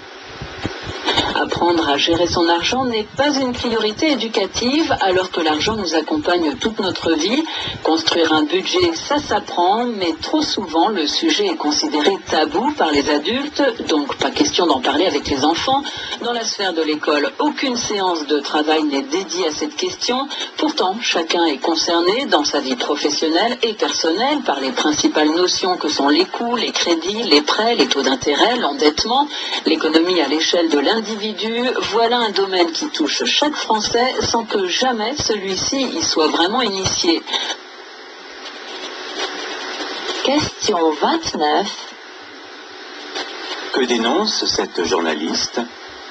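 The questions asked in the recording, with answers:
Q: Que dénonce cette journaliste ?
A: L'absence d'éducation à la gestion de l'argent, notamment à l'école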